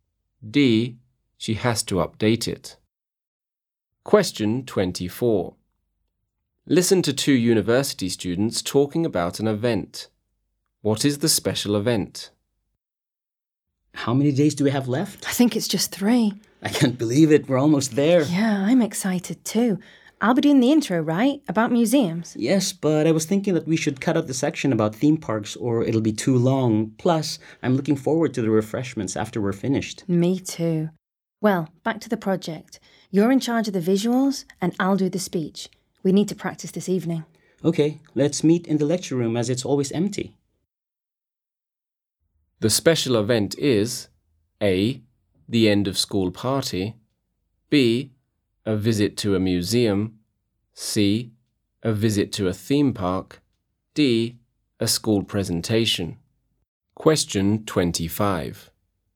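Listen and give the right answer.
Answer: D: a school presentation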